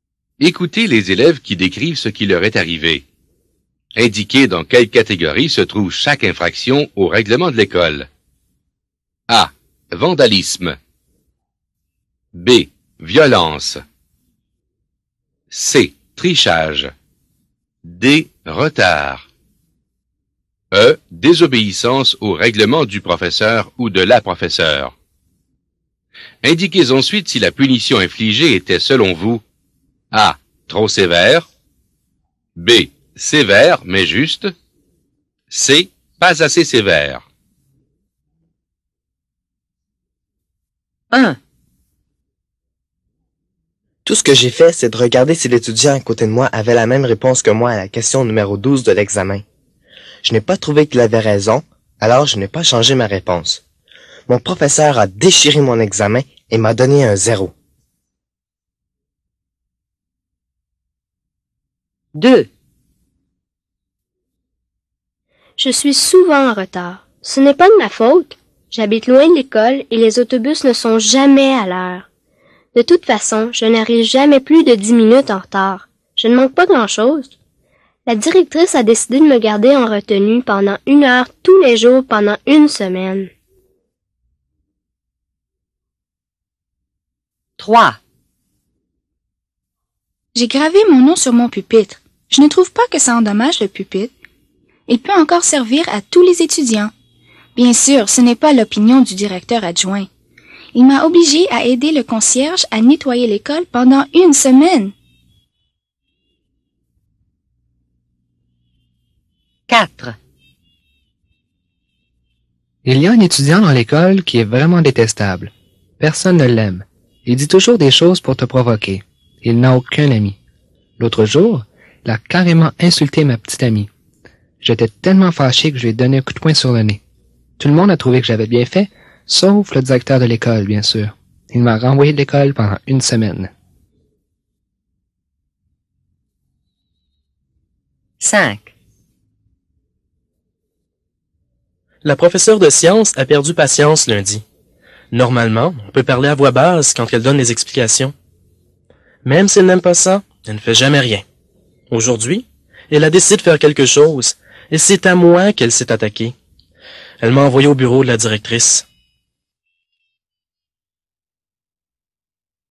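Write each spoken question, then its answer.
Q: Indiquez dans quelle catégorie se trouve chaque infraction au règlement de l'école.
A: C: Trichage

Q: Indiquez dans quelle catégorie se trouve chaque infraction au règlement de l'école.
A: D: Retard

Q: Indiquez dans quelle catégorie se trouve chaque infraction au règlement de l'école.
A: A: Vandalisme

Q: Indiquez dans quelle catégorie se trouve chaque infraction au règlement de l'école.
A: B: Violence

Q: Indiquez dans quelle catégorie se trouve chaque infraction au règlement de l'école.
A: E: Désobéissance au règlement du professeur ou de la professeure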